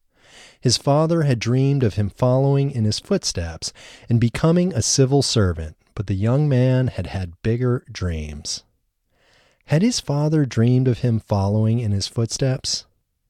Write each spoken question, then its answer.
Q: Had his father dreamed of him following in his footsteps?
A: Yes, he had. His father had dreamed of him following in his footsteps.